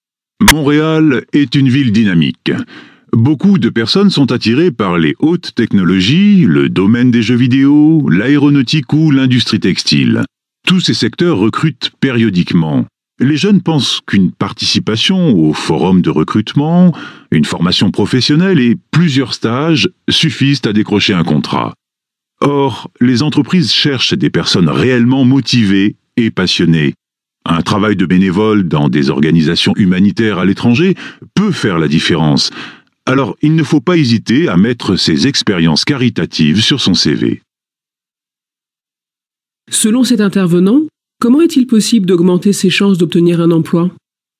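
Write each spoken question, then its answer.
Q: Selon cet intervenant, comment est-il possible d'augmenter ses chances d'obtenir un emploi?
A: En faisant du bénévolat dans des organisations humanitaires à l'étranger et en le mentionnant sur son CV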